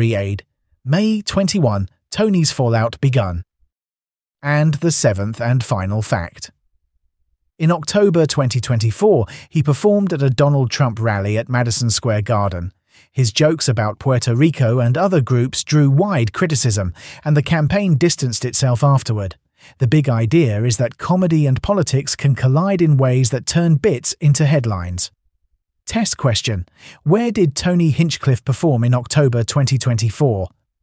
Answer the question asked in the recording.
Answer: Correct answer, Madison Square Garden.